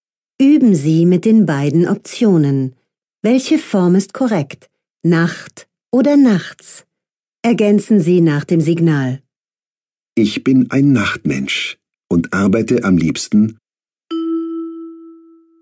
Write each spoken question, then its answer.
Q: Ich bin ein Nachtmensch und arbeite am liebsten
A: nachts.